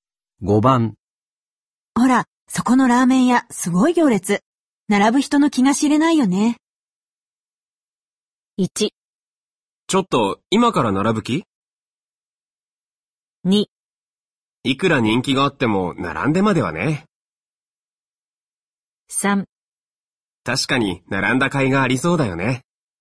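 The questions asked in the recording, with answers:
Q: ほら、そこのラーメン屋、すごい行列。並ぶ人の気が知れないよね。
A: 2: いくら人気があっても、並んでまではね。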